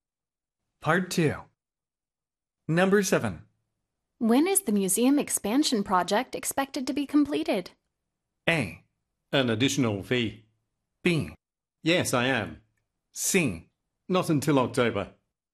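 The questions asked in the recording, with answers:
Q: When is the museum expansion project expected to be completed?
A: C: Not until October.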